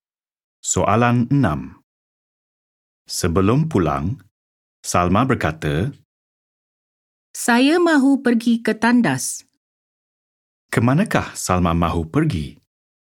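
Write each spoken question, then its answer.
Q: Kemanakah Salma mahu pergi?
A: Ke tandas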